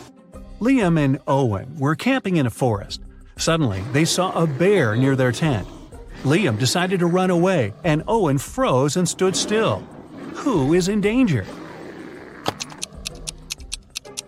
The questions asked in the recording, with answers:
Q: Who is in danger?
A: Liam, the bear is likely to start chasing him